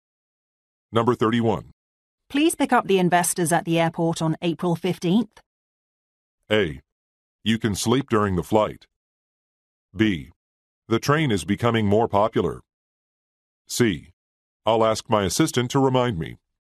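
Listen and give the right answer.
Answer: C: I'll ask my assistant to remind me.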